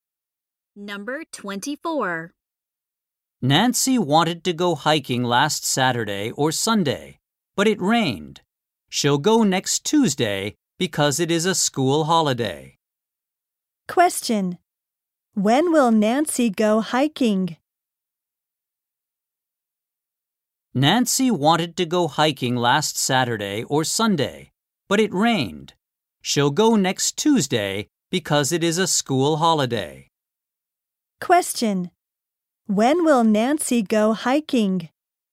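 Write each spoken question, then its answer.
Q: Question. When will Nancy go hiking?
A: Next Tuesday.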